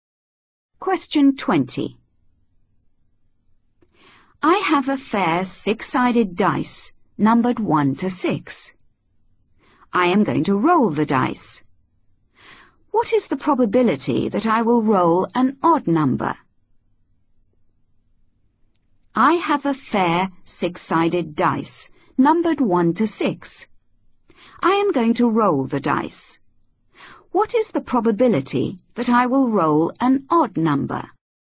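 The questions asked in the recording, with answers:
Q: What is the probability that I will roll an odd number?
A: 1/2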